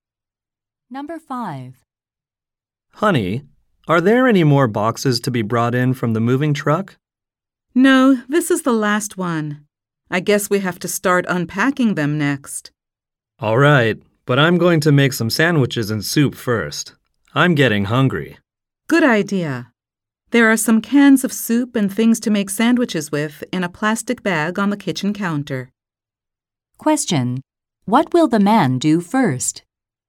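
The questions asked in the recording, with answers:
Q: What will the man do first?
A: Make sandwiches and soup.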